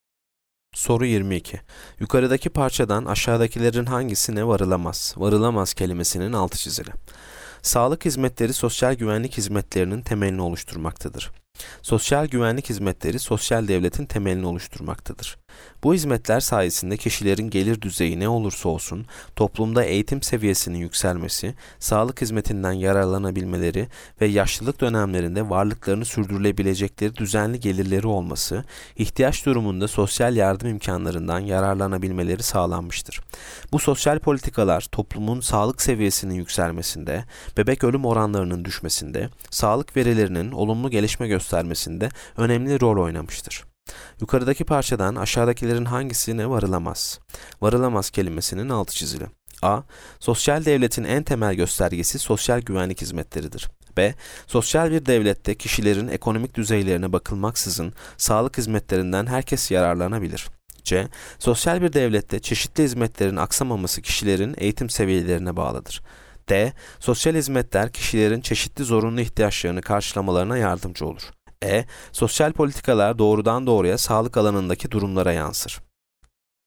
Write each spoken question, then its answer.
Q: Yukarıdaki parçadan aşağıdakilerin hangisine varılamaz?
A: Yanıt C. Sosyal bir devlette çeşitli hizmetlerin aksamaması kişilerin eğitim seviyelerine bağlıdır.